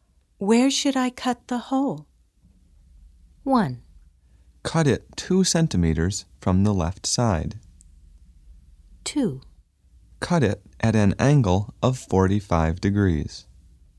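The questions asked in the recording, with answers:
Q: Where should I cut the hole?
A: 1: Cut it 2 centimeters from the left side.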